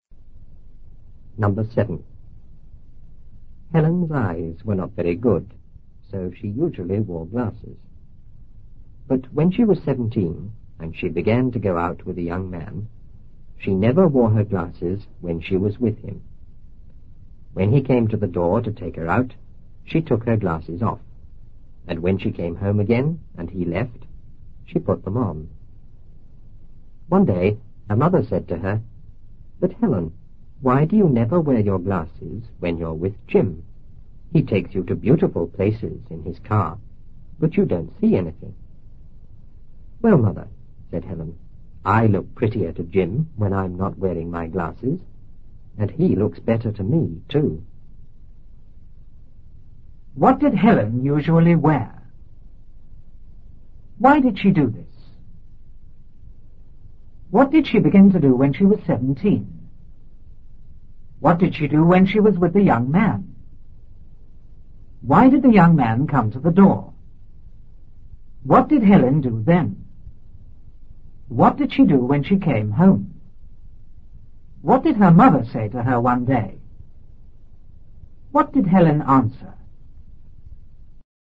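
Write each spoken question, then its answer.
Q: What did Helen usually wear?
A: Glasses

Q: Why did she do this?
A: Her eyes were not very good

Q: What did she begin to do when she was 17?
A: Go out with a young man

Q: What did she do when she was with the young man?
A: She never wore her glasses

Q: Why did the young man come to the door?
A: To take her out

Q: What did Helen do then?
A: She took her glasses off

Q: What did she do when she came home?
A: She put her glasses on

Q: What did her mother say to her one day?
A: Why do you never wear your glasses when you're with Jim? He takes you to beautiful places but you don't see anything

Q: What did Helen answer?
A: She looks prettier to Jim without her glasses, and he looks better to her too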